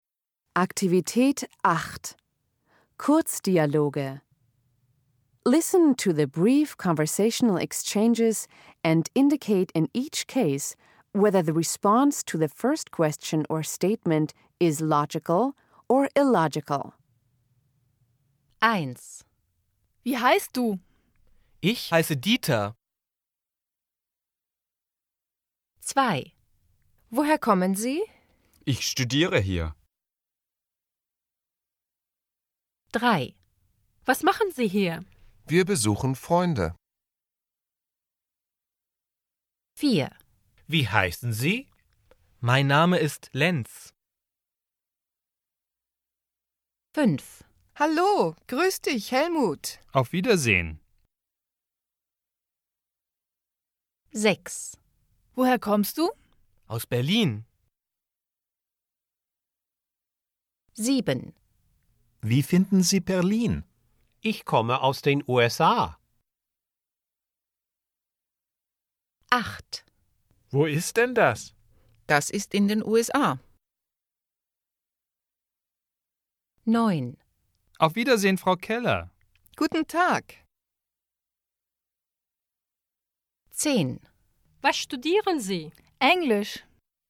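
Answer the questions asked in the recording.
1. logical
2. illogical
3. logical
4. logical
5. illogical
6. logical
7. illogical
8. logical
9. illogical
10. logical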